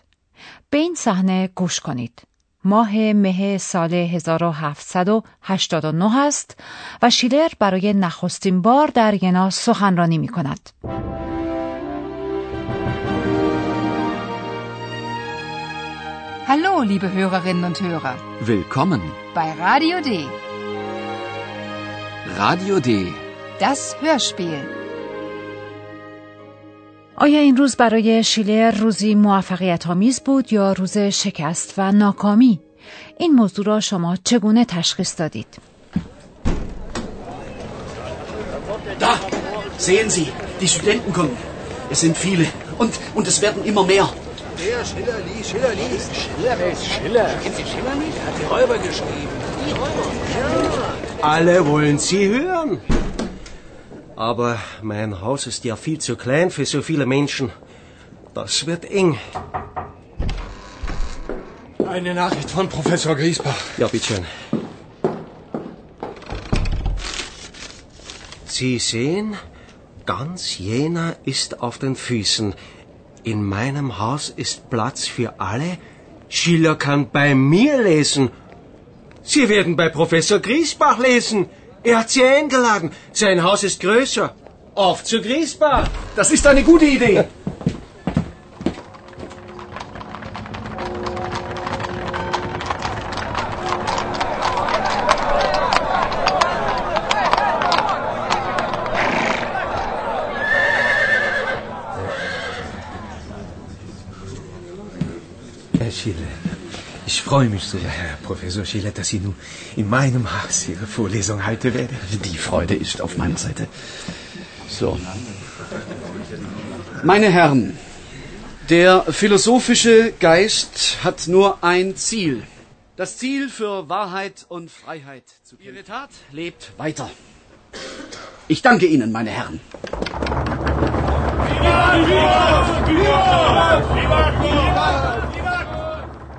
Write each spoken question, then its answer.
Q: آیا این روز برای شیلر روزی موفقیت آمیز بود یا روز شکست و ناکامی؟ این موضوع را شما چگونه تشخیص دادید؟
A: از فضای حاکم بر سالن شما متوجه خورسندی و رضایت حاضرین می شوید.